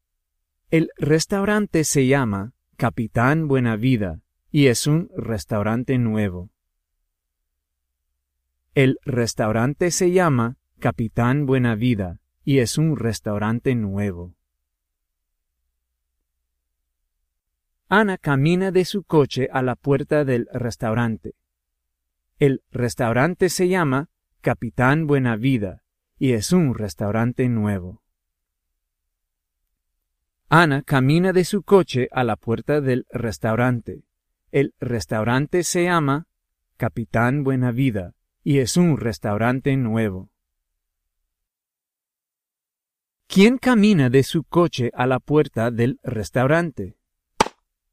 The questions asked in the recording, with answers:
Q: ¿Quién camina de su coche a la puerta del restaurante?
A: Ana camina a la puerta del restaurante mexicano.